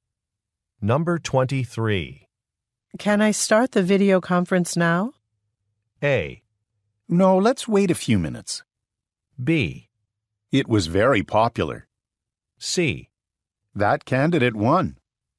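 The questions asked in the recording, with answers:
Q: Can I start the video conference now?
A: A: No, let's wait a few minutes.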